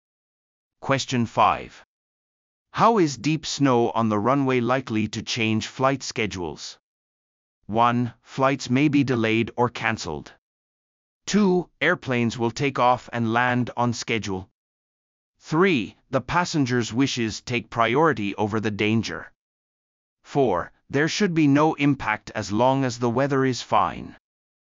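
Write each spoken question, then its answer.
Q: How is deep snow on the runway likely to change flight schedules?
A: 1: Flights may be delayed or cancelled.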